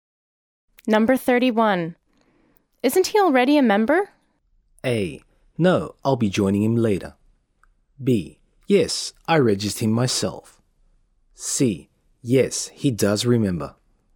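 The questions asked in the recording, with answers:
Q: Isn't he already a member?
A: B: Yes, I registered him myself.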